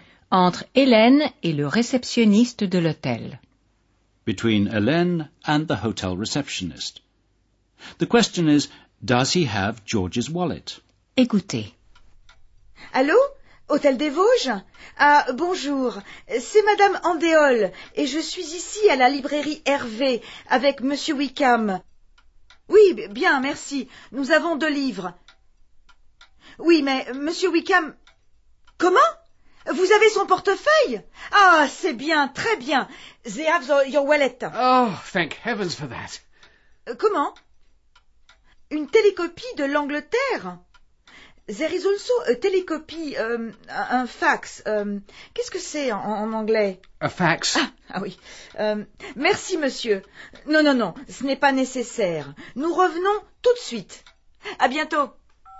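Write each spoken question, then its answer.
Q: The question is, does he have George's wallet?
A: Yes, the hotel has George's wallet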